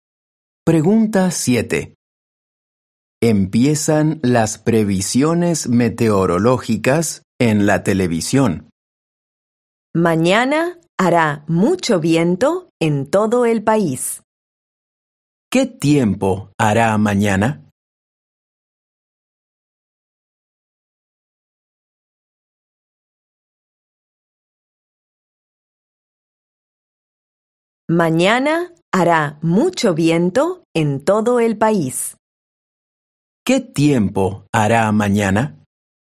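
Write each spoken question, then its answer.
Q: ¿Qué tiempo hará mañana?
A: Hará mucho viento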